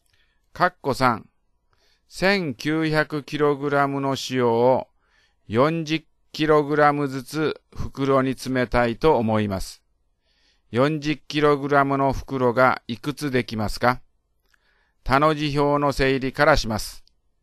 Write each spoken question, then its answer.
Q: 40kg の袋がいくつできますか?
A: だから、答えは47袋です。